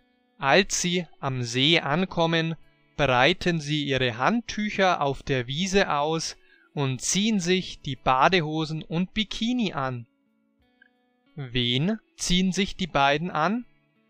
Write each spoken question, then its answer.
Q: Wen ziehen sich die beiden an?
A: Die Badehosen und Bikini.